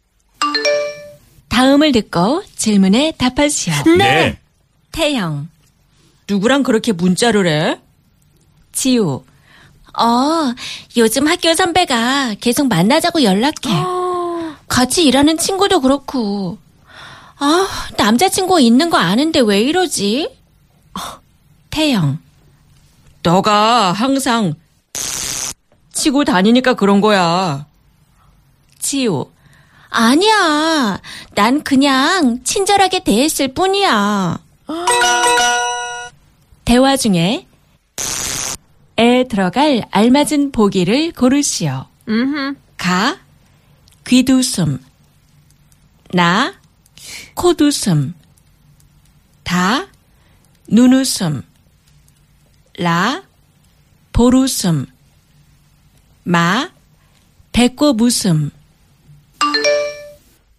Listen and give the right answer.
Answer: 다 너가 항상 눈 웃음 치고 다니니까 그런 거야.